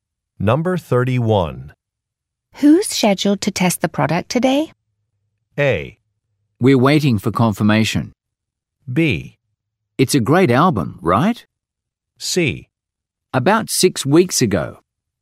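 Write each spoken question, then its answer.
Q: Who's scheduled to test the product today?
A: A: We're waiting for confirmation.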